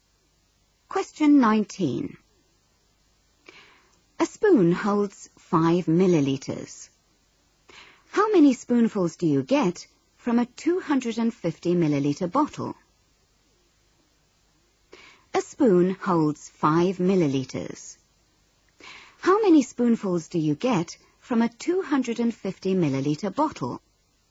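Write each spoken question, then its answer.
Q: How many spoonfuls do you get from a 250-milliliter bottle?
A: 50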